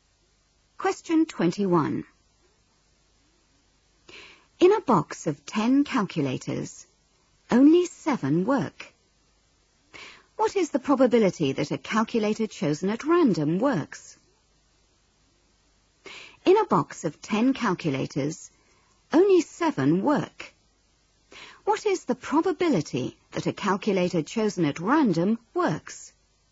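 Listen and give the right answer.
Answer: 7/10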